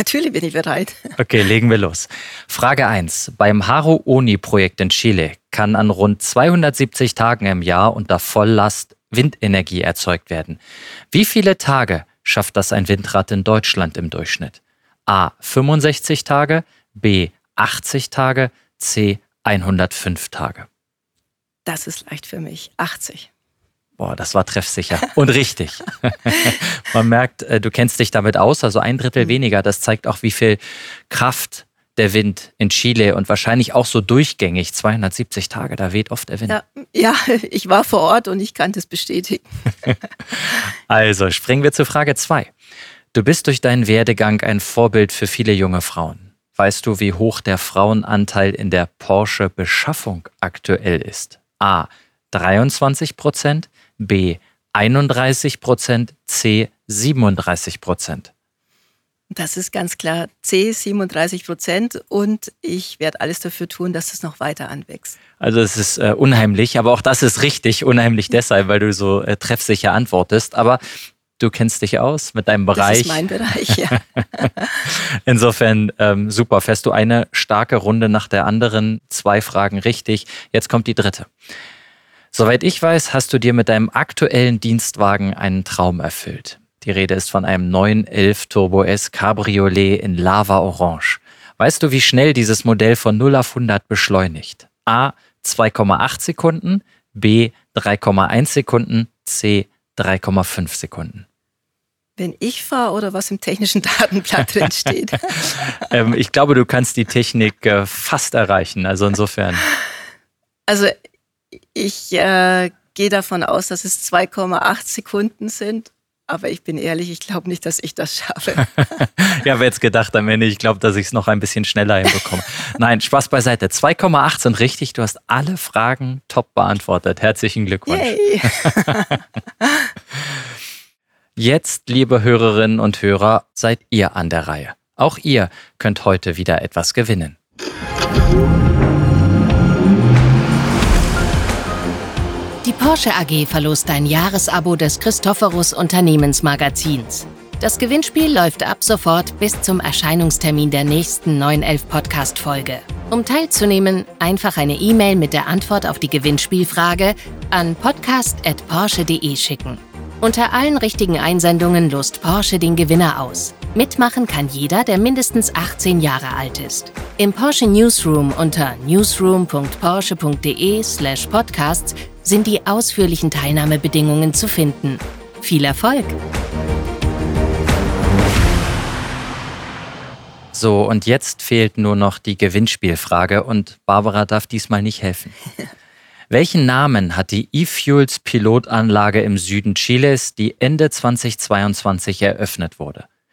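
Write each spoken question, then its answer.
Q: Welchen Namen hat die E-Fuels Pilotanlage im Süden Chiles, die Ende 2022 eröffnet wurde?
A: Haru Oni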